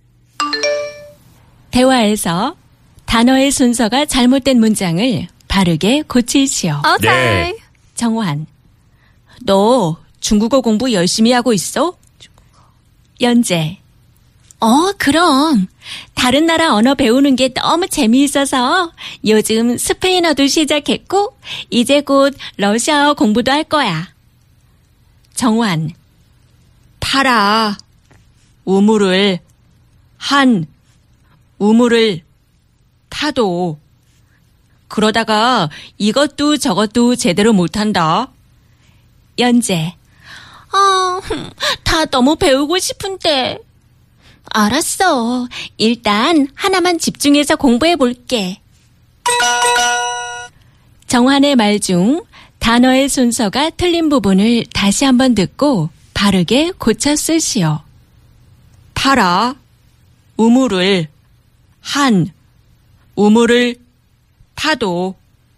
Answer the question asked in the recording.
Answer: Correct answer was 우물을 파도 한 우물을 파라.